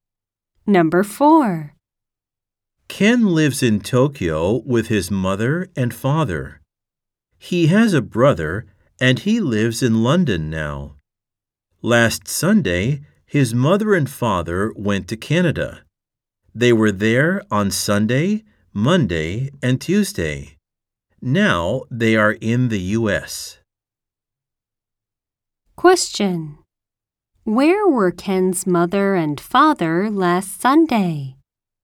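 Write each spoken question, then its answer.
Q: Where were Ken's mother and father last Sunday?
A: In Canada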